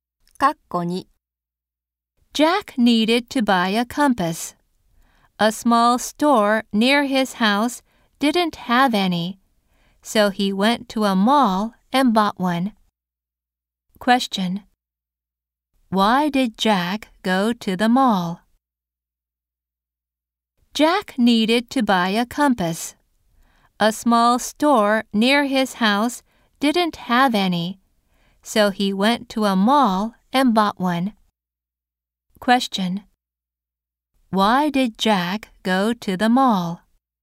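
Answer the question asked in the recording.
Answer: To buy a compass, because the small store didn't have any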